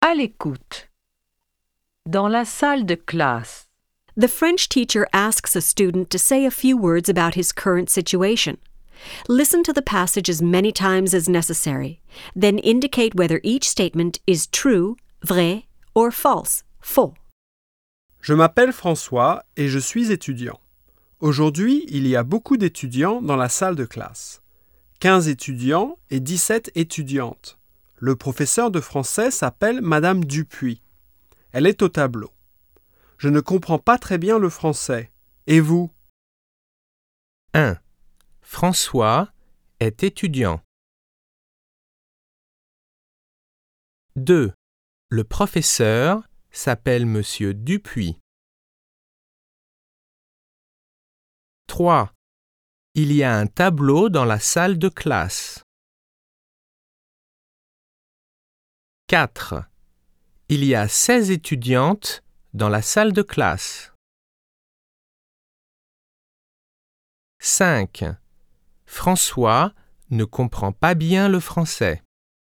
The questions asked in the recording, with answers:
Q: François est étudiant.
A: 1. Vrai.

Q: Le professeur s'appelle Monsieur Dupuis.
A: 2. Faux.

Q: Il y a un tableau dans la salle de classe.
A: 3. Vrai.

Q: Il y a 16 étudiantes dans la salle de classe.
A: 4. Faux.

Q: François ne comprend pas bien le français.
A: 5. Vrai.